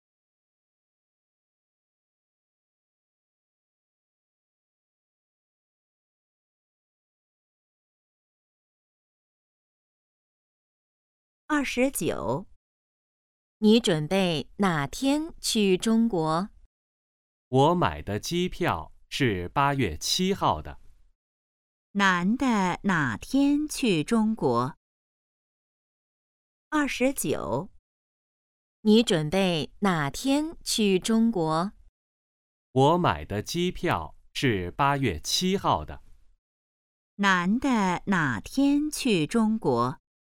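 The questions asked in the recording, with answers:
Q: 男的哪天去中国?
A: 8月7号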